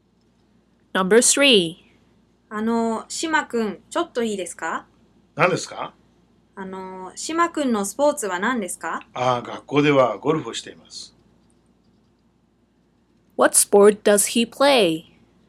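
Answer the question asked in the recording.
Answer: Golf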